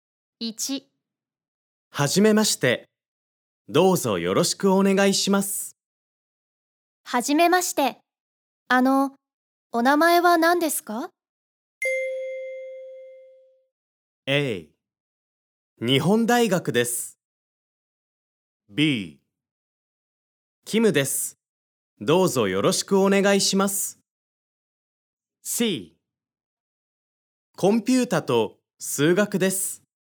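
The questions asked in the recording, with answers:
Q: はじめまして。お名前は何ですか?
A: B: キムです。どうぞよろしくお願いします。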